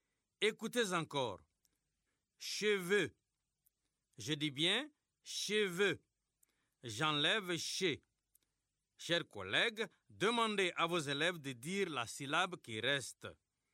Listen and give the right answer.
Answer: Il reste vœu.